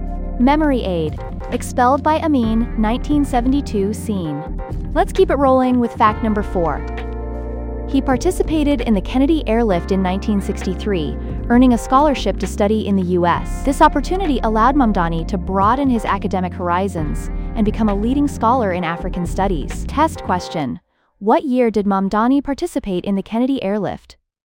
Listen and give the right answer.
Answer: Correct answer. 1963.